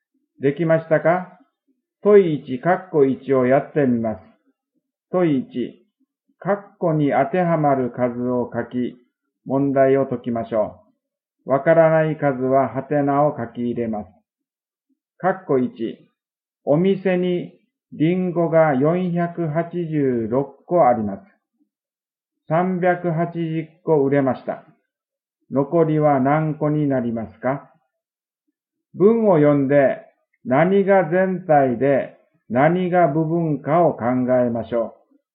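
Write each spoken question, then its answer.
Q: お店にリンゴが486個あります。380個売れました。残りは何個になりますか?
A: 106個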